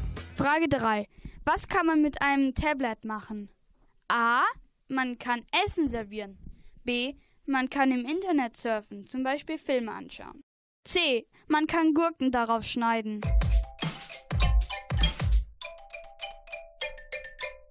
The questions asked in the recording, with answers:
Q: Was kann man mit einem Tablet machen?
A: Antwort B ist richtig, im Internet surfen.